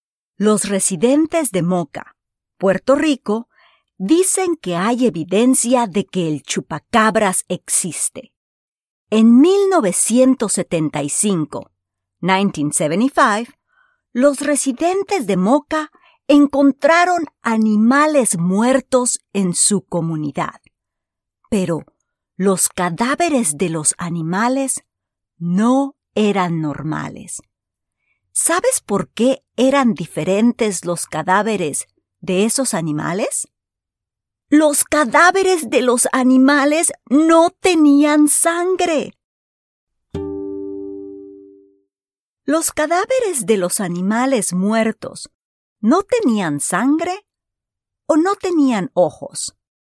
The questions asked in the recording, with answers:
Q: ¿Los cadáveres de los animales muertos no tenían sangre o no tenían ojos?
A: Muy bien, los cadáveres de los animales muertos tenían ojos.